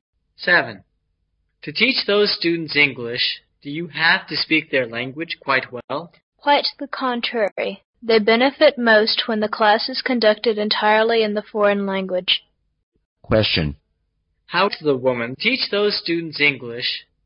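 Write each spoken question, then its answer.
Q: How does the woman teach those students English?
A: She conducts the class entirely in English.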